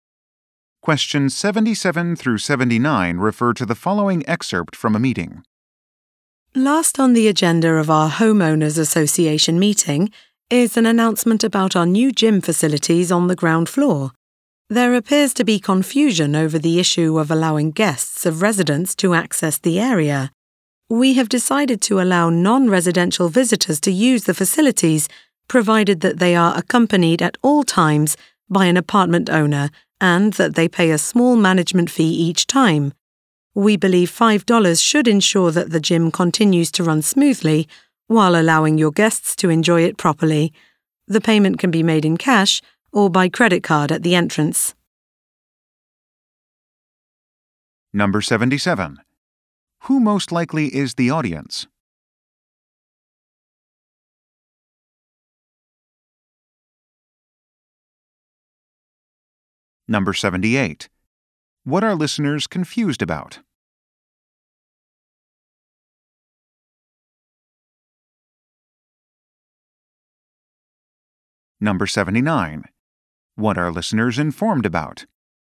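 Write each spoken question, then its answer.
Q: Who most likely is the audience?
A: Apartment residents (homeowners)

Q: What are listeners confused about?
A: Whether guests can use the gym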